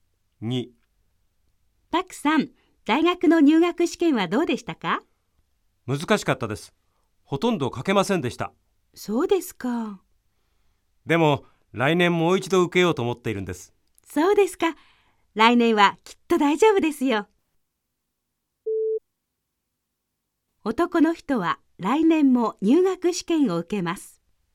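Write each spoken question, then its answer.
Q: 男の人は来年も入学試験を受けます。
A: ○(正しい)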